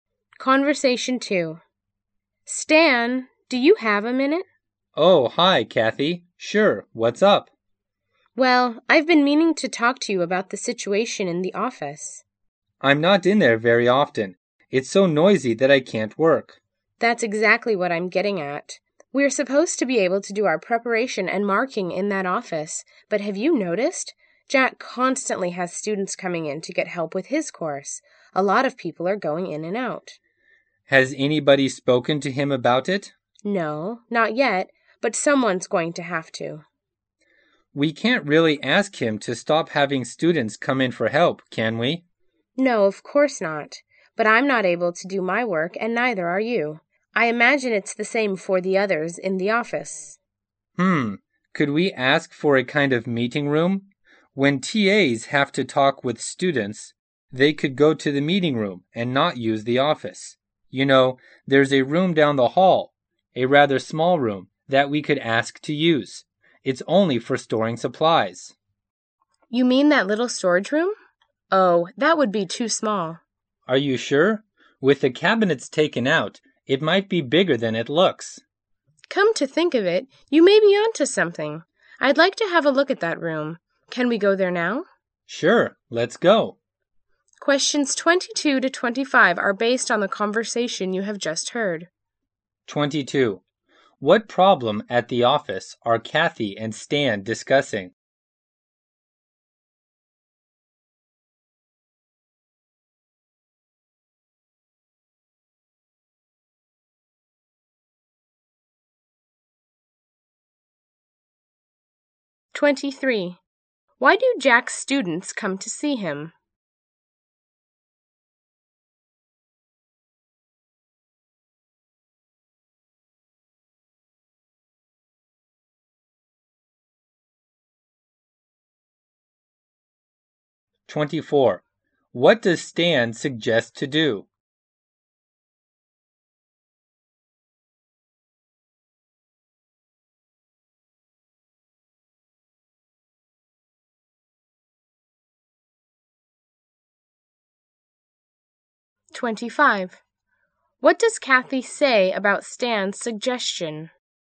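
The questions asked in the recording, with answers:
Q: What problem at the office are Kathy and Stan discussing?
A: It is too noisy to work

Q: Why do Jack's students come to see him?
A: To get help with his course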